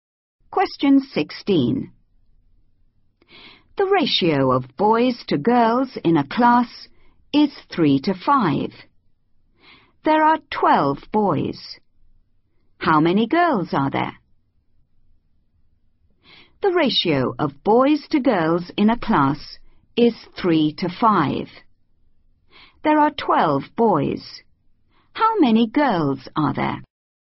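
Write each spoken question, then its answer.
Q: There are 12 boys. How many girls are there?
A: 20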